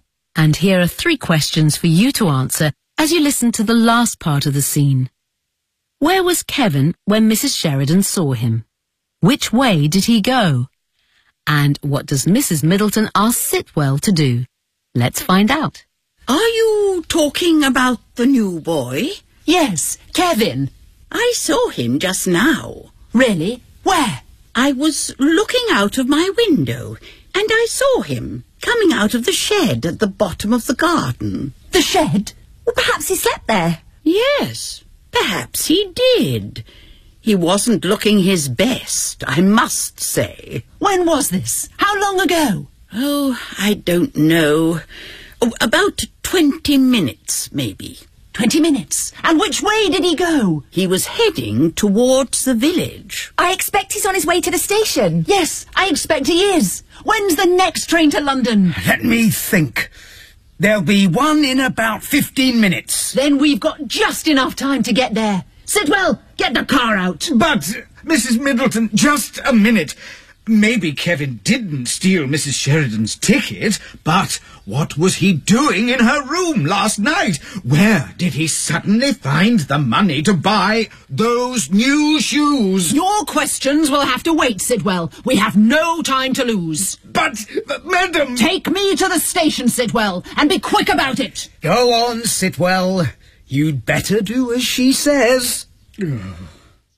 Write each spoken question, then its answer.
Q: Where was Kevin when Mrs. Sheridan saw him?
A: I saw him coming out of the shed at the bottom of the garden.

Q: Which way did he go?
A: He was heading towards the village.

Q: And what does Mrs. Middleton ask Sitwell to do?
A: Take me to the station, Sitwell, and be quick about it.